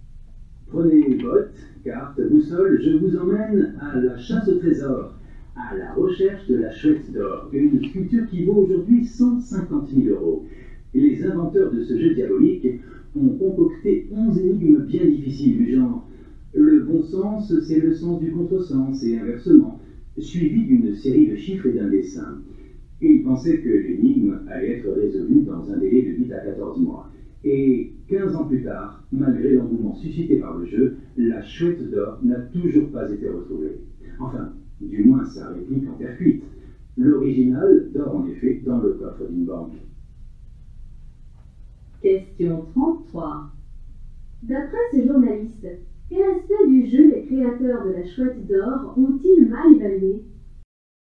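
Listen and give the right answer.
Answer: Le temps nécessaire pour résoudre l'énigme (ils pensaient 8 à 14 mois, elle n'est toujours pas résolue après 15 ans)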